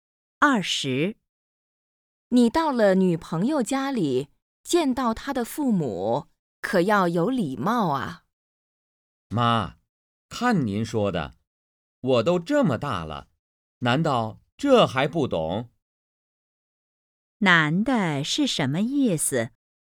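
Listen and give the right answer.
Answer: 他懂礼貌,不用担心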